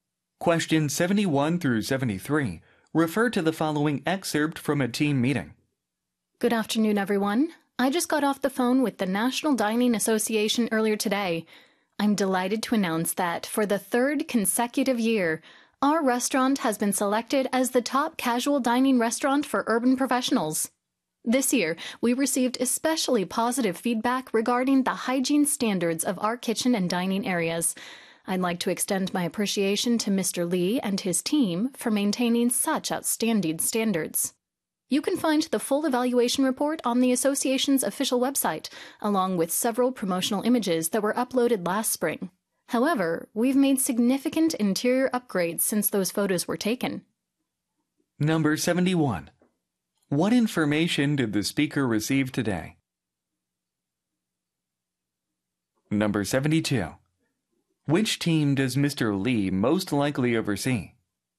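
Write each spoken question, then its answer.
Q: What information did the speaker receive today?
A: The restaurant was chosen as the top casual dining restaurant for urban professionals for the third year in a row.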